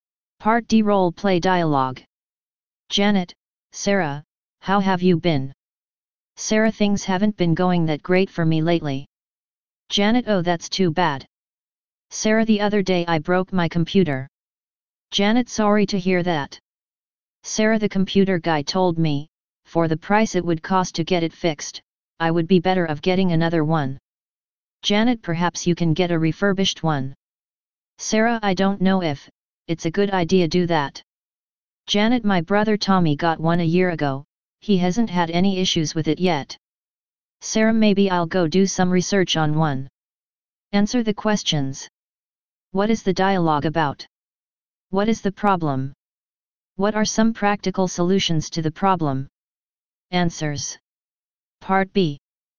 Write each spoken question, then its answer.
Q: What is the dialogue about?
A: A Broken Computer.

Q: What is the problem?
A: S has no money to fix his or her computer.

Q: What are some practical solutions to the problem?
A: Get a new computer, a refurbished computer, or get the old one fixed.